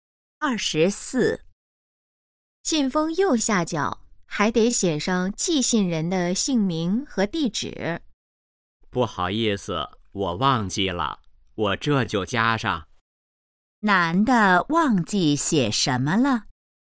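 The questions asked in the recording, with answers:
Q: 男的忘记写什么了?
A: 寄信人的姓名和地址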